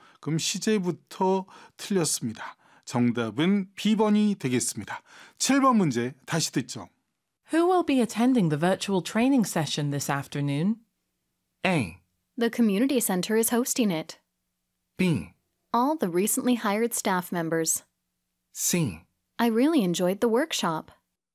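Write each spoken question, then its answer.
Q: Who will be attending the virtual training session this afternoon?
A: B: All the recently hired staff members.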